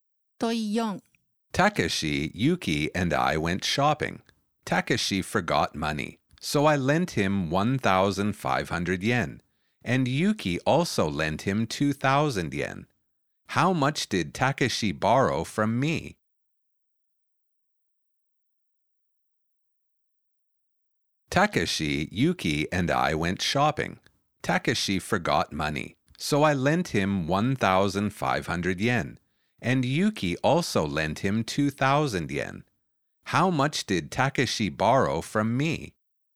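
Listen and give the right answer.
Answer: 1,500 yen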